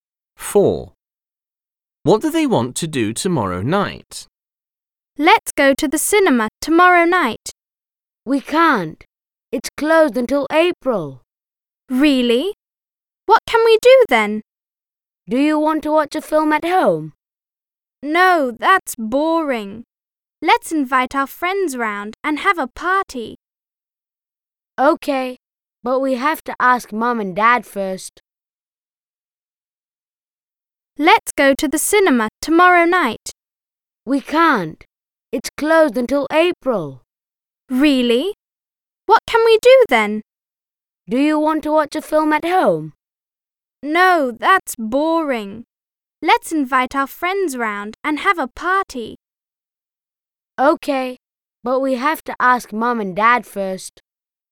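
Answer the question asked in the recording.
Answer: have a party with friends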